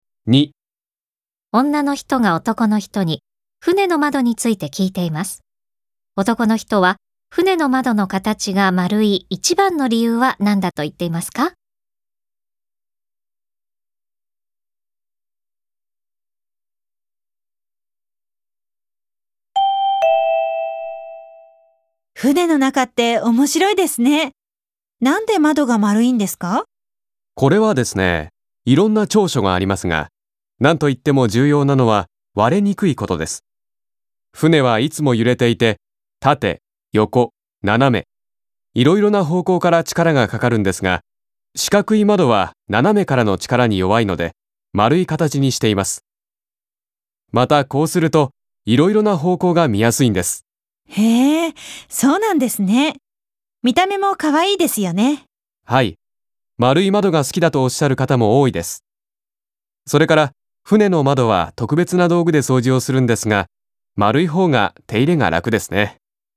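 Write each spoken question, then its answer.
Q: 男の人は船の窓の形が丸い一番の理由は何だと言っていますか?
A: 割れにくいから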